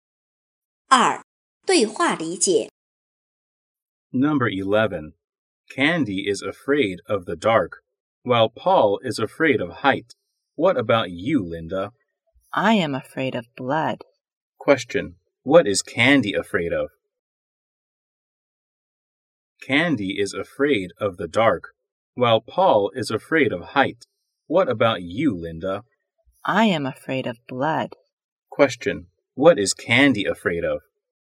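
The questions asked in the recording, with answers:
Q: what is Candy afraid of?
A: The dark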